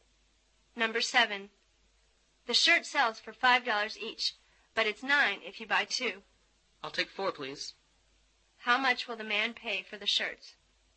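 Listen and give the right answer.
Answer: $18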